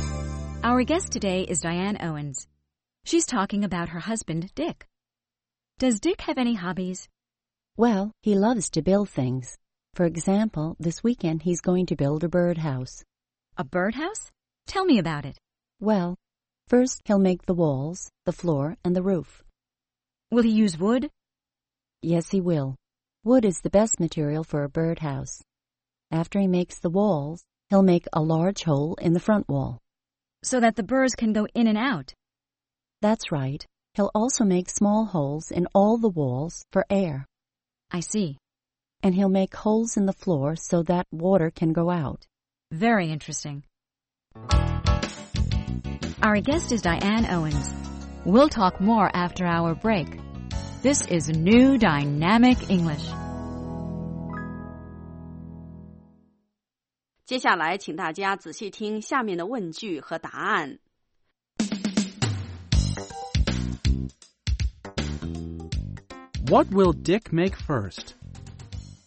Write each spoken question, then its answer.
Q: What will Dick make first?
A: First, he'll make the walls, the floor, and the roof.